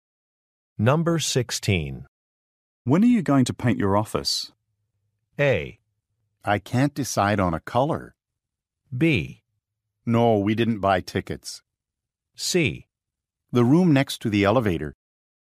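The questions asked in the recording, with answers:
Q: When are you going to paint your office?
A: A: I can't decide on a color.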